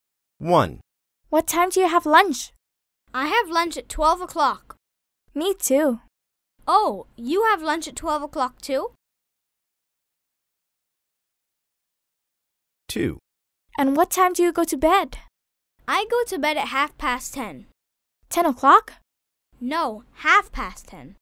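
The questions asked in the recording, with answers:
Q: What time do you have lunch?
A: 12 o'clock

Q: And what time do you go to bed?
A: 10:30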